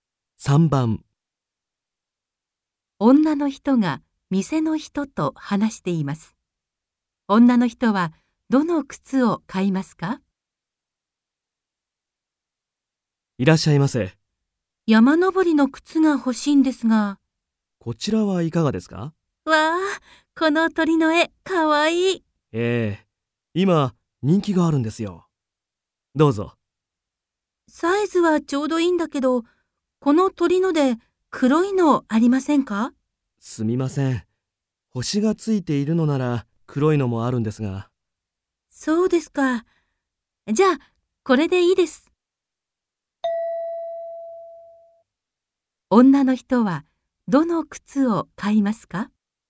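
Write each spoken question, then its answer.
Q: 女の人はどの靴を買いますか?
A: 鳥の絵がついている靴(黒くないもの、最初に勧められたもの)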